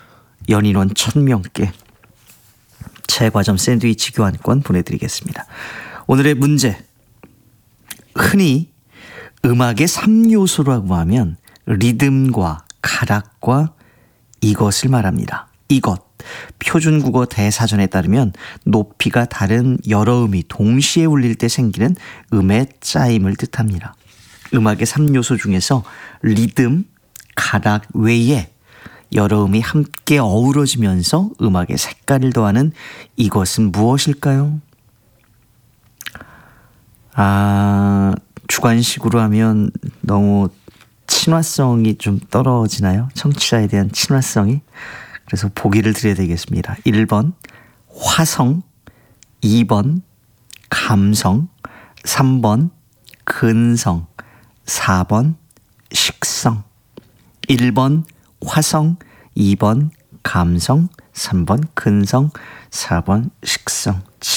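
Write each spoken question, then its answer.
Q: 음악의 3요소 중에서 리듬, 가락 외에 여러 음이 함께 어우러지면서 음악에 색깔을 더하는 이것은 무엇일까요?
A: 1: 화성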